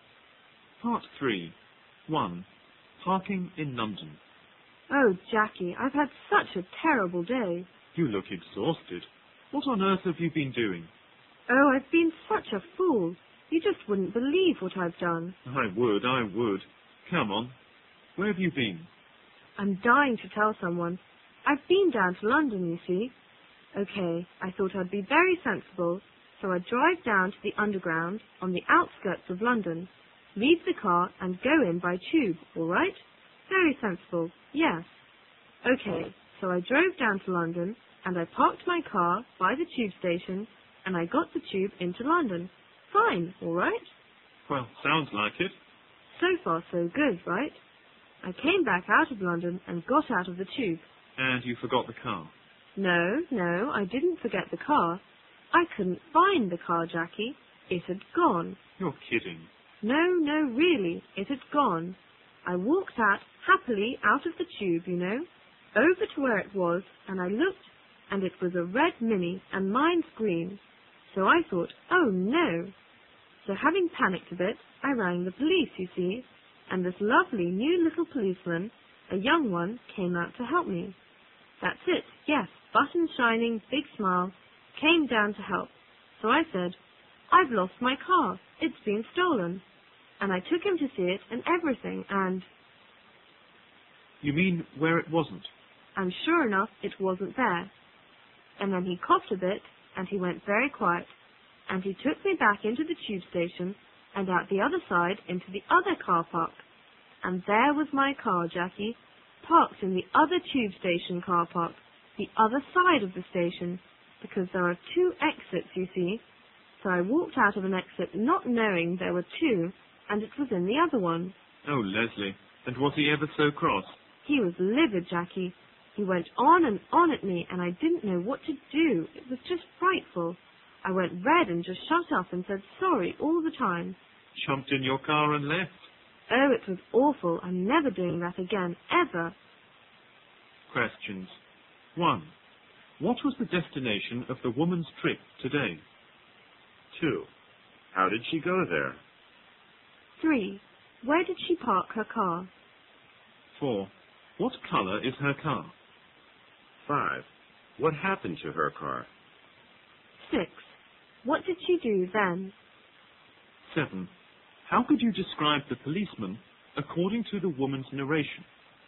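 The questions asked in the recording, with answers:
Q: What was the destination of the woman's trip today?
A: London

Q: How did she go there?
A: She drove to a tube station on the outskirts of London and then took the tube in

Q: Where did she park her car?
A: In the car park by the tube station on the outskirts of London

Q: What color is her car?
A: Green

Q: What happened to her car?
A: Nothing; she thought it had been stolen, but it was in the other car park on the other side of the station

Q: What did she do then?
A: She rang the police

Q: How could you describe the policeman according to the woman's narration?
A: Young and new, with shining buttons and a big smile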